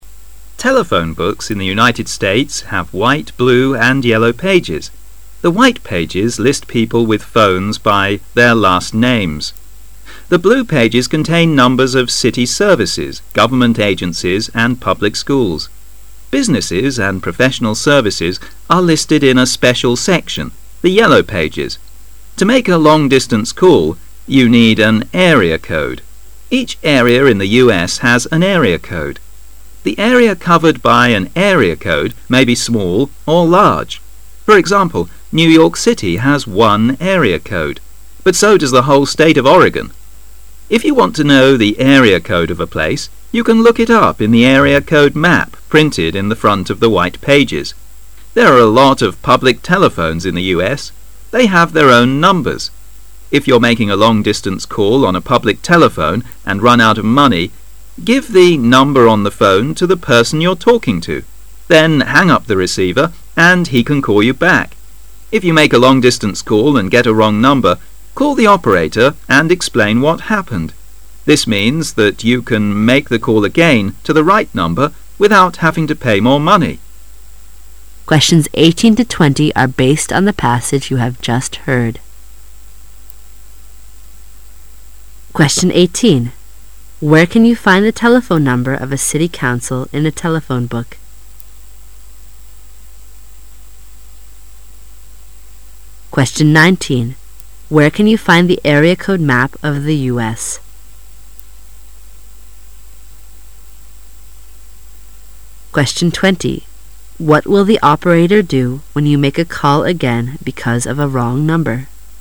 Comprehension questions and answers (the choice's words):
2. Where can you find the area code map of the U. S.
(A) On the first page of the telephone book.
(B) At the end of the telephone book.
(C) In the front of the white pages.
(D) Right after the white pages.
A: In the front of the white pages.

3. What will the operator do when you make a call again because of a wrong number?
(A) Charge you twice as much as before.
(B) Charge you nothing.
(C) Charge you the same as the last time.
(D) Charge you the same as usual.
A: Charge you nothing.

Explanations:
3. 题目问的足:当你打错电话了再打时,接线员会做什么? 文中最后一句提到: This means that you can make a call again to the right number without having to pay more money"这意味着你可以再次拨打正确的号码但不用付费"。由此可知[B]"不收费"是正确的。

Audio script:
[解析] 18-20 Telephone books in the United States have white, blue and yellow pages. The white pages list people with phones by their last name. The blue pages contain numbers of city services, government agencies and public schools. Businesses and professional services are listed in a special section, the yellow pages. To make a long distance call, you need an area code. Each area in the U.S. The area covered by an area code may be small or large. For example, New York City has one area code. But so does the whole State of Oregon. If you want to know the area code of a place, you can look it up in the area code map printed in the front of the white pages. Therc are a lot of public telephones in the U.S. They have their own numbers. If you are making a long distance call on a public telephone and run out of money, give the number on your phone to the person you're talking to. Then hang up the receiver and he can call you back. If you make a long distance call and get a wrong number, call the operator and cxplain what happened. This means that you can make the call again to the right number without having to pay more money. 18.Where can you find the telephone number of a city council in a telephone book?